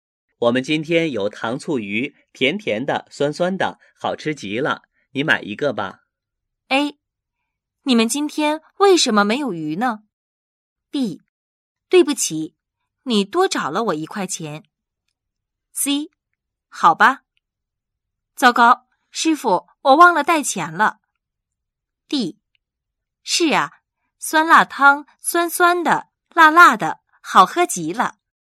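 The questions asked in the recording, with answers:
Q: 我们今天有糖醋鱼,甜甜的,酸酸的,好吃极了,你买一个吧。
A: C: 好吧。糟糕,师傅,我忘了带钱了。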